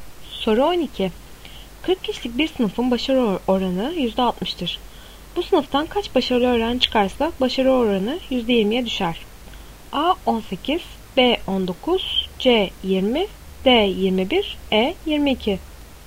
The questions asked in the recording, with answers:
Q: Bu sınıftan kaç başarılı öğrenci çıkarsa başarı oranı %20'ye düşer.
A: Doğru cevap C 20.